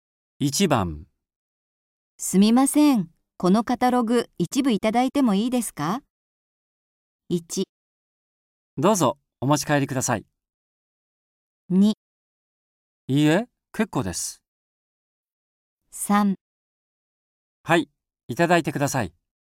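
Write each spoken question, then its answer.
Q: すみません、このカタログ一部いただいてもいいですか?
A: 1: どうぞ、お持ち帰りください。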